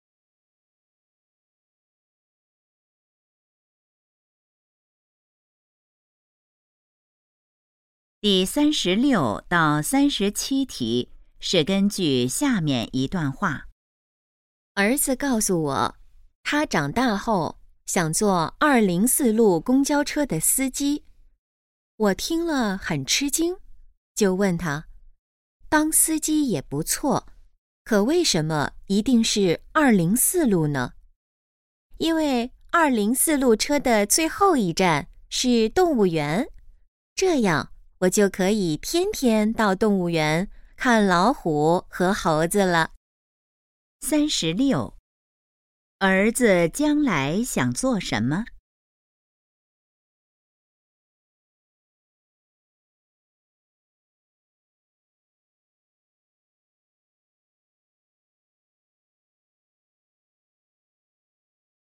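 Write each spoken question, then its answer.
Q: 儿子将来想做什么?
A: 204路公交车司机

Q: 关于204路公交车,可以知道什么?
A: 最后一站是动物园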